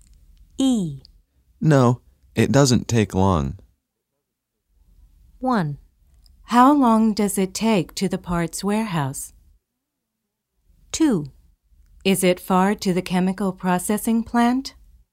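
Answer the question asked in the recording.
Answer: 2: Is it far to the chemical processing plant?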